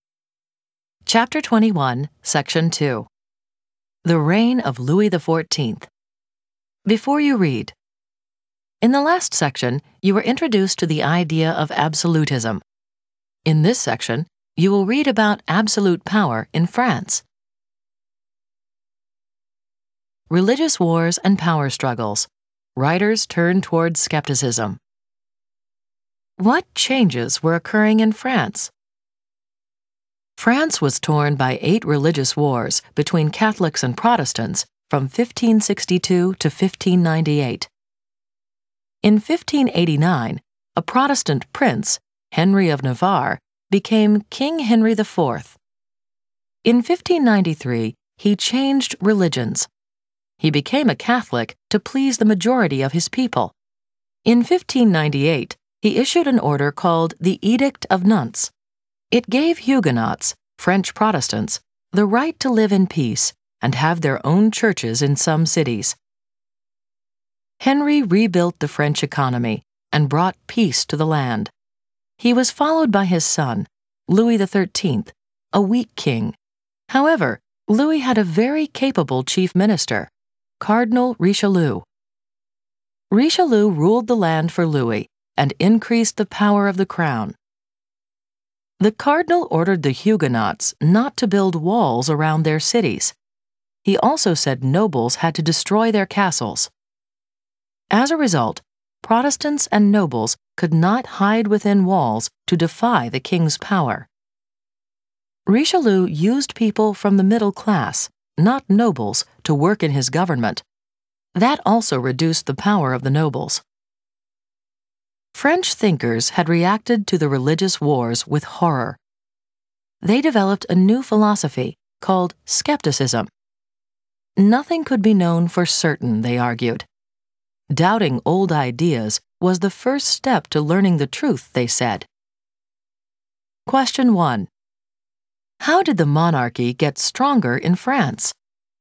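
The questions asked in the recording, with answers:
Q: How did the monarchy get stronger in France?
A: Richelieu made Huguenots stop building walls around their cities and made nobles destroy their castles, and used middle-class people in government, which weakened the nobles and strengthened the crown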